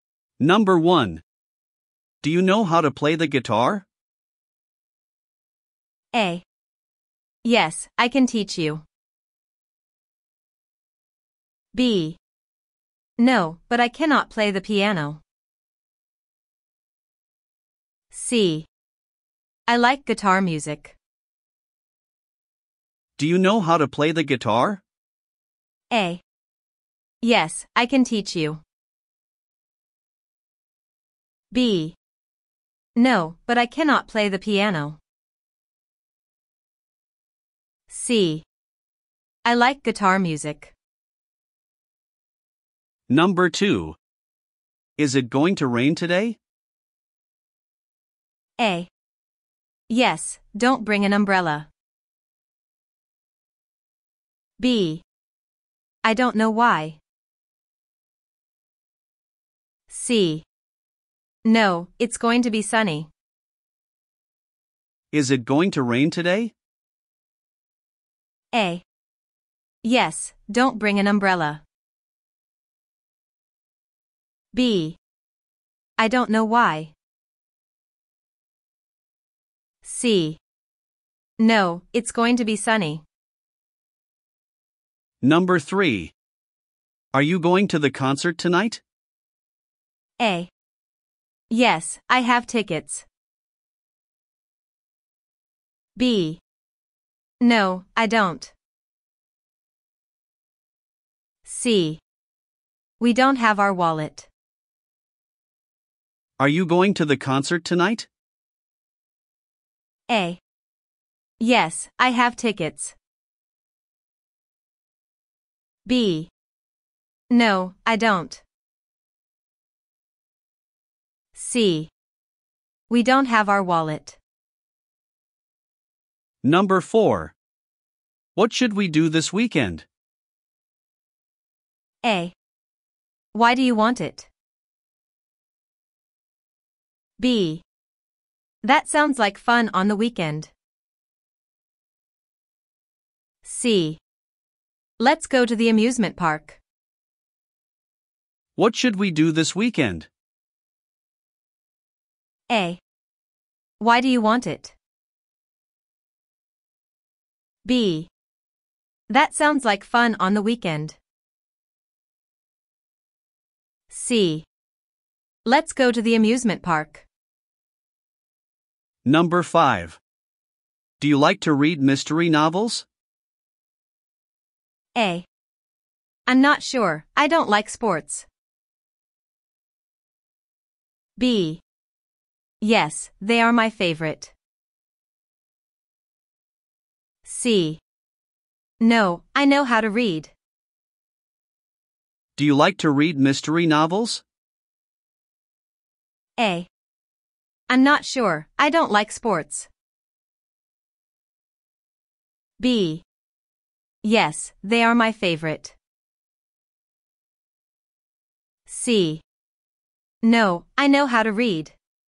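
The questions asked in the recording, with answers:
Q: Do you know how to play the guitar?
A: A: Yes, I can teach you.

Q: Is it going to rain today?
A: C: No, it's going to be sunny.

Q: Are you going to the concert tonight?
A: A: Yes, I have tickets.

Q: What should we do this weekend?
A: C: Let's go to the amusement park.

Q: Do you like to read mystery novels?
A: B: Yes, they are my favorite.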